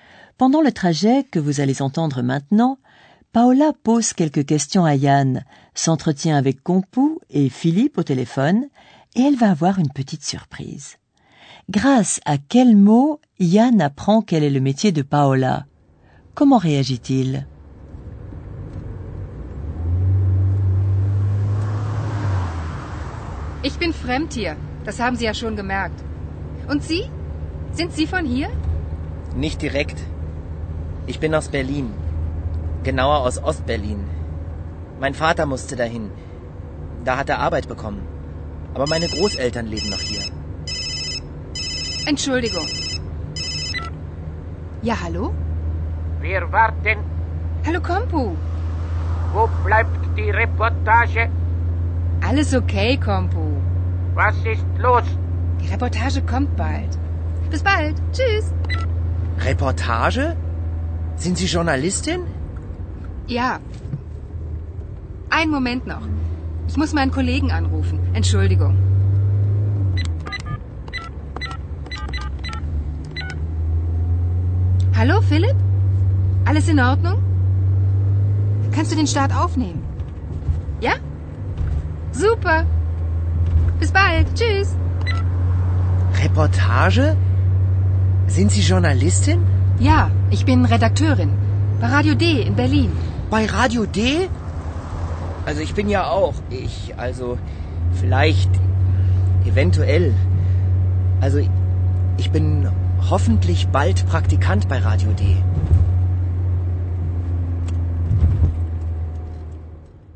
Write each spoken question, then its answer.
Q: Grâce à quel mot Yann apprend quel est le métier de Paola Comment réagit-il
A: Et c'est le mot reportage qui fait soudain comprendre à Yann que Paola est journaliste.